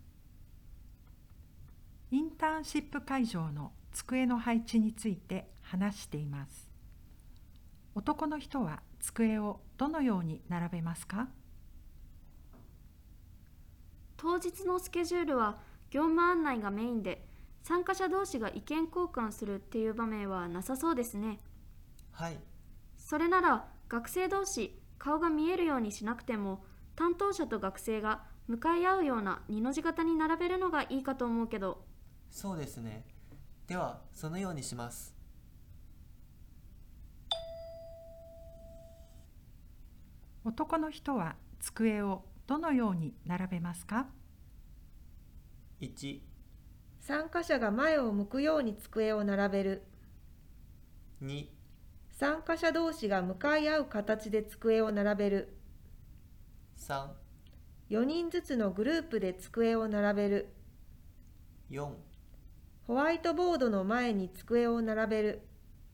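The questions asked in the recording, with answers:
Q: 男の人は机をどのように並べますか?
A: 1: 参加者が前を向くように机を並べる。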